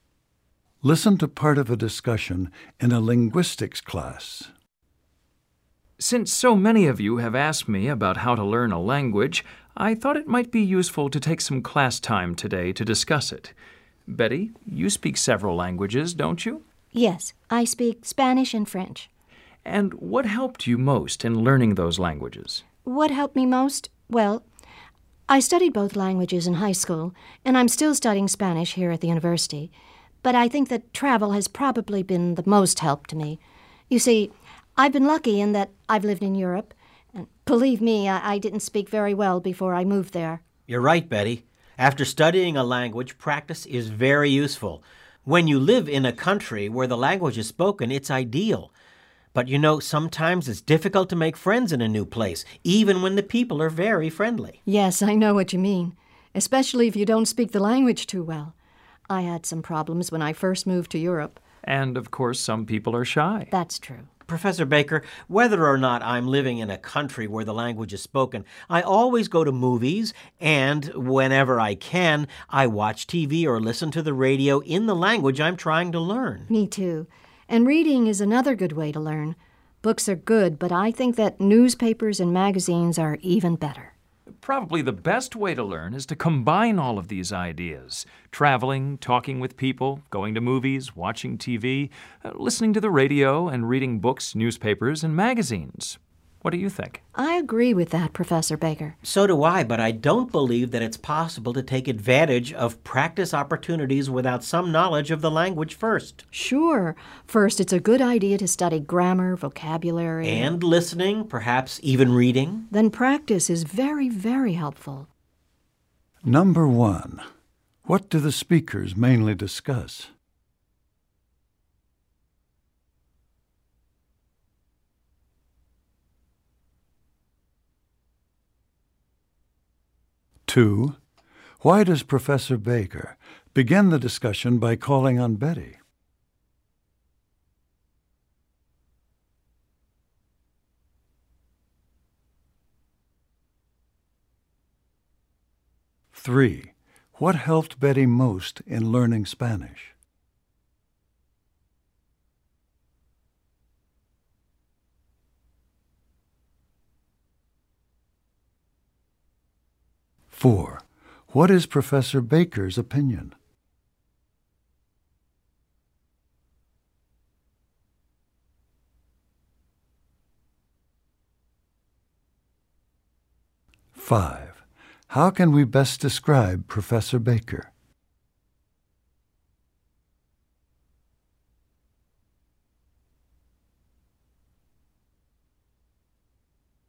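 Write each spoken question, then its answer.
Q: what do the speakers mainly discuss?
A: How to learn a foreign language

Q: why does Professor Baker begin the discussion by calling on Betty?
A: Because Betty speaks several languages

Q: what helped Betty most in learning Spanish?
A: Travel (living in Europe)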